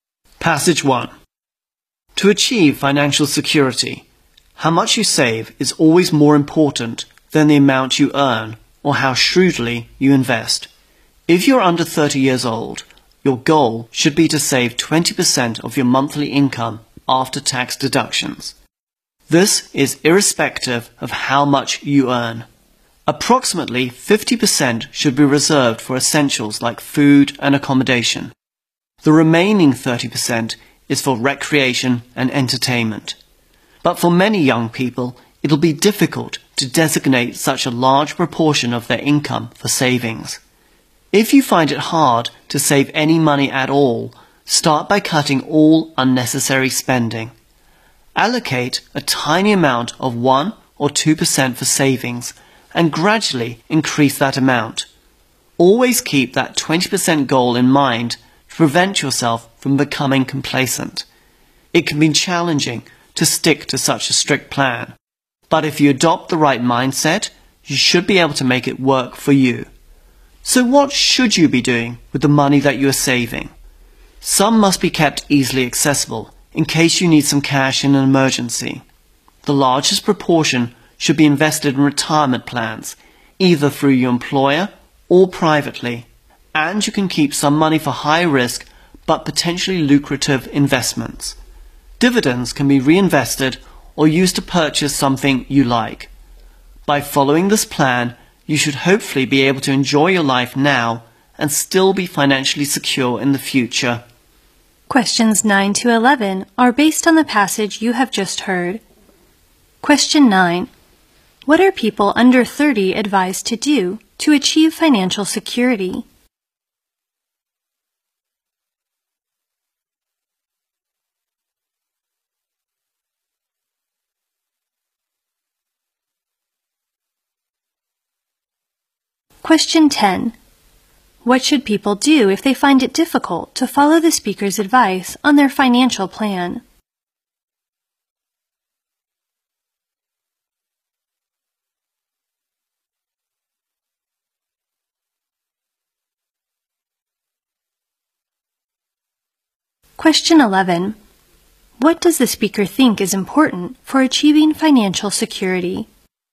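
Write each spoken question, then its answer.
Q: What are people under 30 advised to do to achieve financial security?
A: Save 20% of their monthly income after tax.

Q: What should people do if they find it difficult to follow the speaker's advice on their financial plan?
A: Cut all unnecessary spending, start by saving 1-2%, and increase it gradually.

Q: What does the speaker think is important for achieving financial security?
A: How much you save matters more than what you earn or how you invest.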